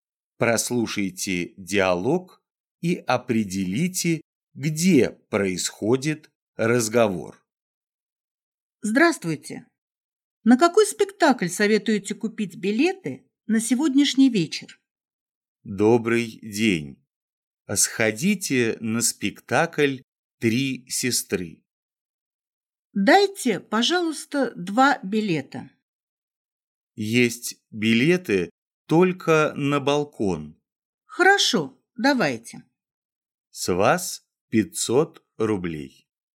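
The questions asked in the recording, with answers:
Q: Прослушайте диалог и определите, где происходит разговор.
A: В театральной кассе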